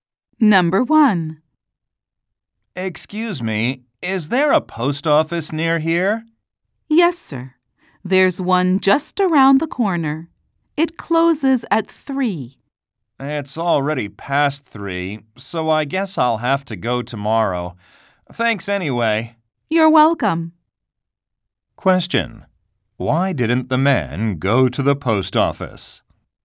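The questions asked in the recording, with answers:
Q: Why didn't the man go to the post office?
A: It was already closed (past 3)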